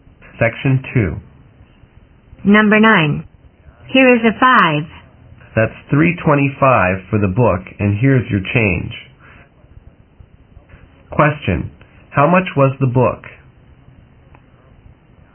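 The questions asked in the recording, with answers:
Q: How much was the book?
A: $3.25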